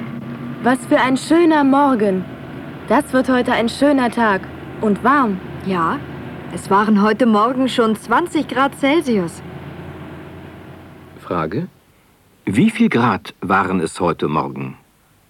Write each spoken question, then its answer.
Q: Wie viel Grad waren es heute Morgen?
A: Heute Morgen waren es 20 Grad.